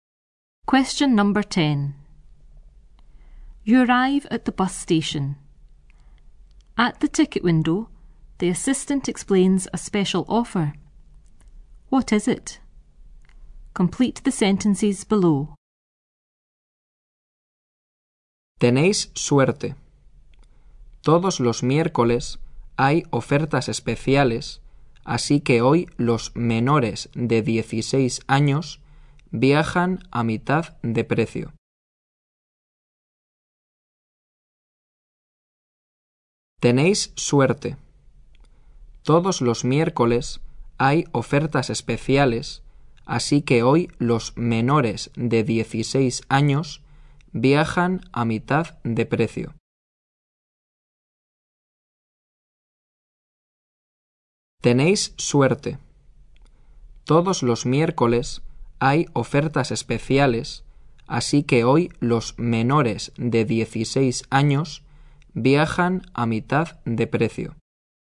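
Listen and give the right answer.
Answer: Every Wednesday under-16s travel at half price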